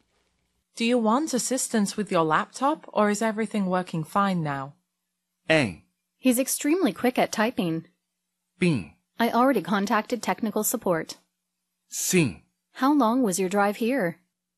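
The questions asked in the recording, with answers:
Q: Do you want assistance with your laptop or is everything working fine now?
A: B: I already contacted technical support.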